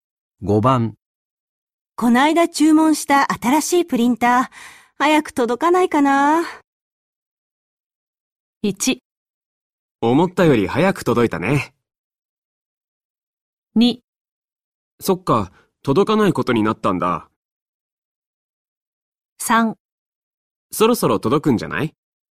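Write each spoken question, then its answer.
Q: ター、早く届かないかな。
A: 3: そろそろ届くんじゃない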